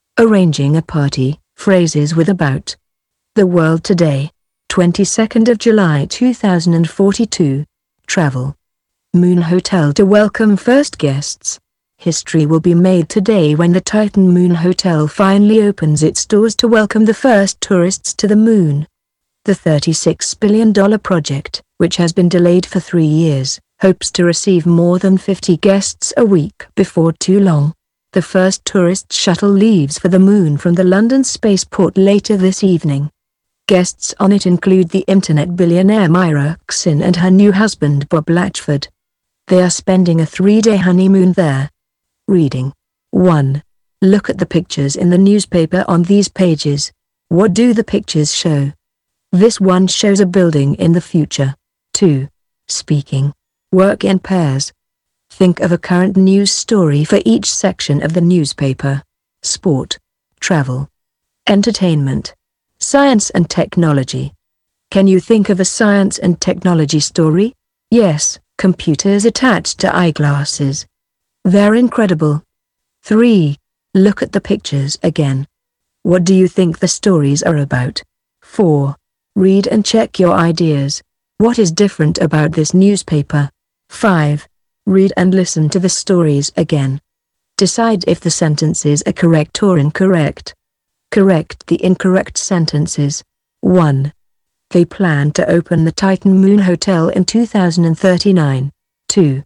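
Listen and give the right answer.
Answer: Correct (it opens in 2042 after a 3-year delay)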